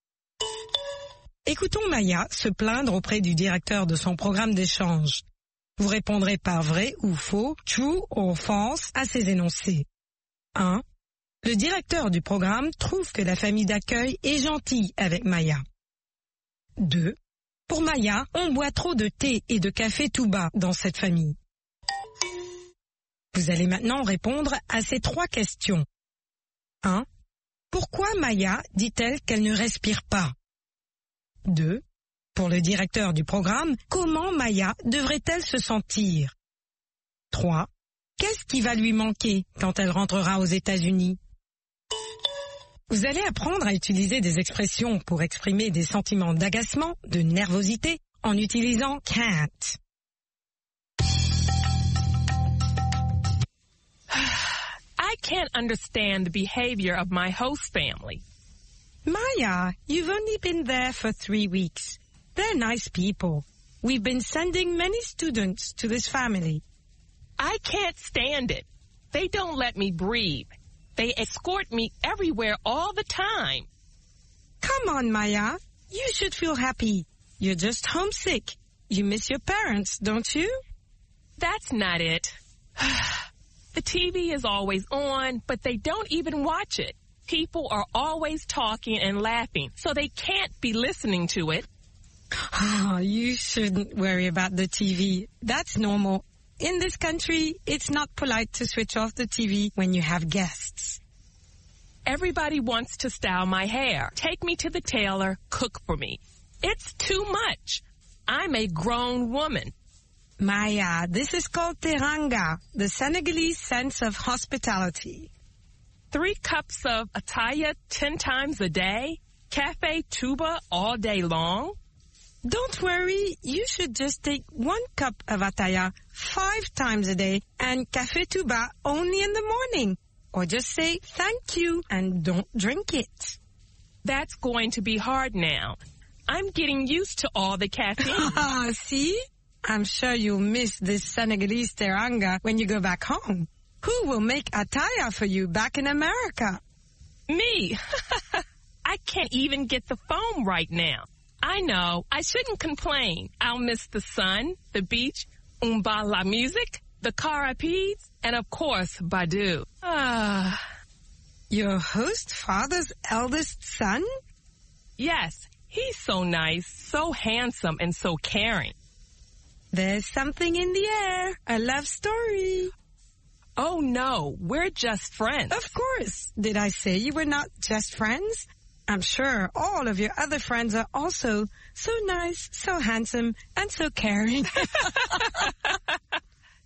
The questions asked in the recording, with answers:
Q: Le directeur du programme trouve que la famille d'accueil est gentille avec Maya.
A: L'énoncé 1 est vrai.

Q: Pour Maya, on boit trop de thé et de café tout bas dans cette famille.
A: L'énoncé 2 est vrai.

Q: Pourquoi Maya dit-elle qu'elle ne respire pas?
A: Parce qu'on l'escorte toujours, partout.

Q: Pour le directeur du programme, comment Maya devrait-elle se sentir?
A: Heureuse.